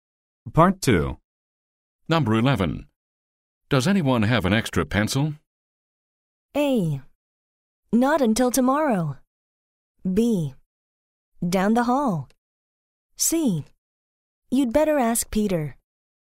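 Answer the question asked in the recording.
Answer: C: You'd better ask Peter.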